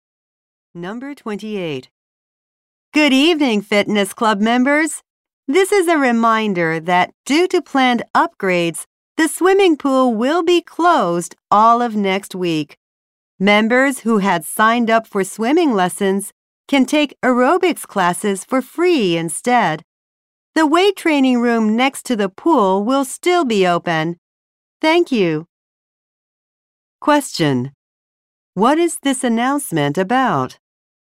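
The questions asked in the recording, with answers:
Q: What is this announcement about?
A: The pool closing next week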